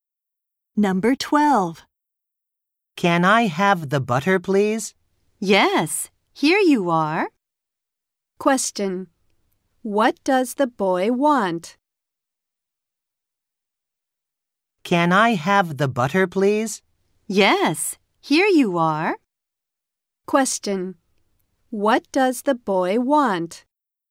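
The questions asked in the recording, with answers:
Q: What does the boy want?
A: The butter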